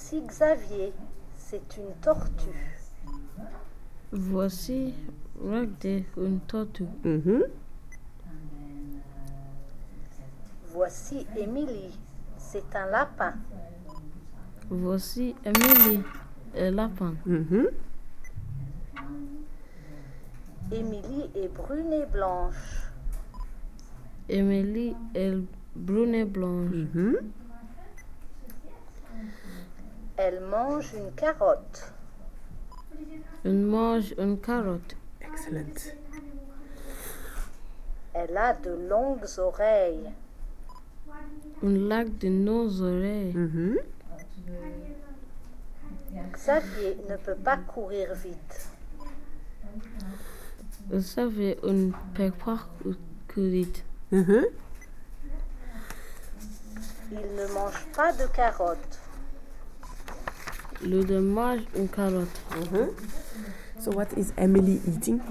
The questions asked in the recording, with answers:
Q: So what is Emily eating?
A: A carrot.